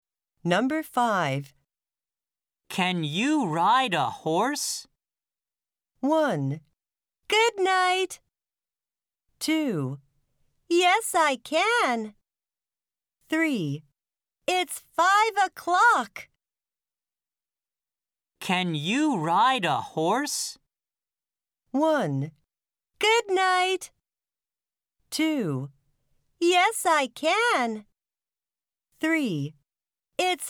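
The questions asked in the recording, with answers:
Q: Can you ride a horse?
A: 2: Yes, I can.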